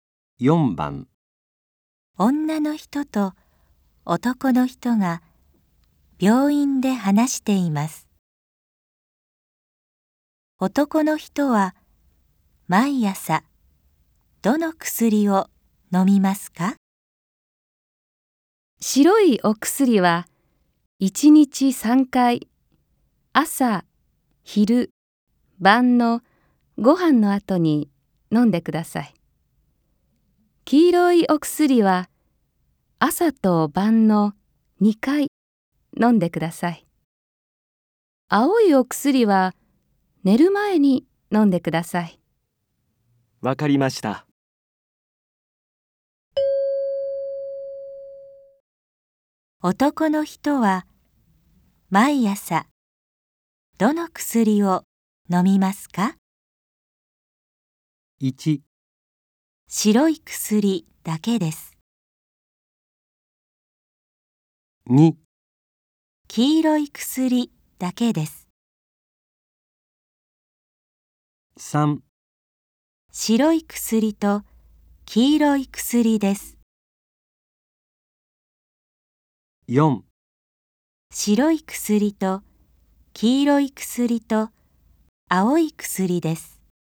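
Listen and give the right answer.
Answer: 3: 白い薬と黄色い薬です。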